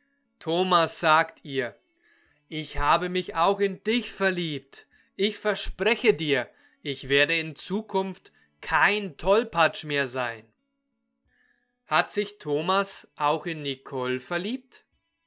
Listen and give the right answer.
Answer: Ja, das sagt er. Er hat sich auch in Nicole verliebt.